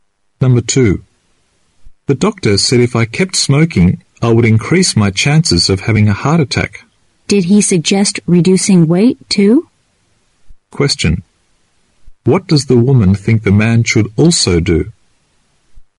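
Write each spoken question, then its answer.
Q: What does the woman think the man should also do?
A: Lose weight.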